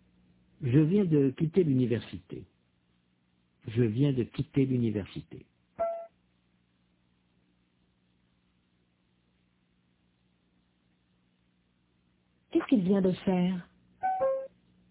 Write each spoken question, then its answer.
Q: Qu'est-ce qu'il vient de faire?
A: Il vient de quitter l'université.